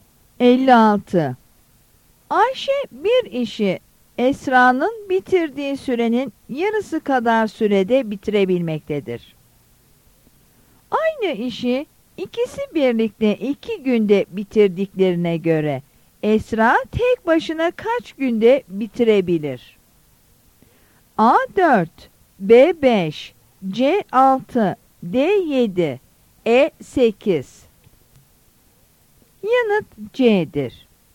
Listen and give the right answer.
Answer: Yanıt C'dir.